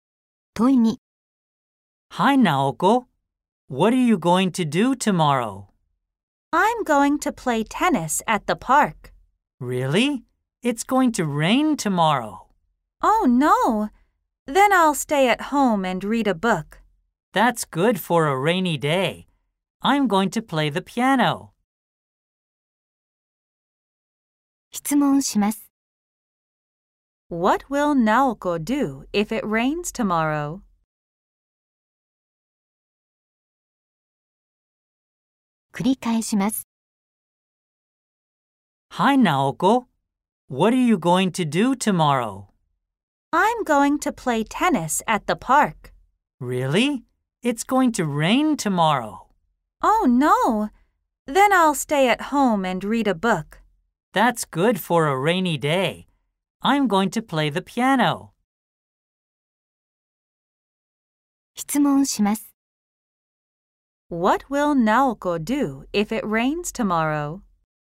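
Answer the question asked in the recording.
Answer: Stay at home and read a book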